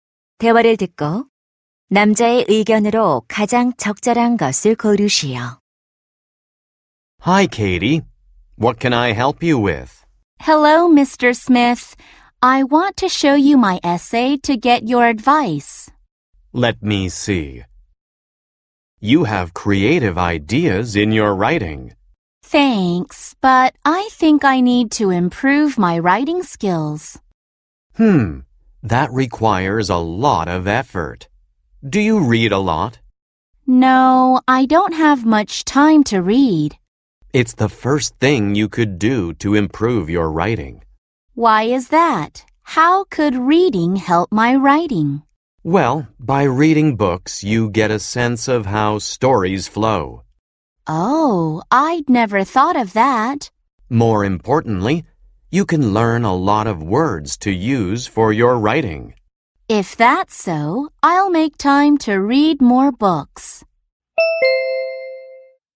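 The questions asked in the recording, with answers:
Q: 대화를 듣고 남자의 의견으로 가장 적절한 것을 고르시오.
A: 독서는 글쓰기 실력 향상에 도움이 된다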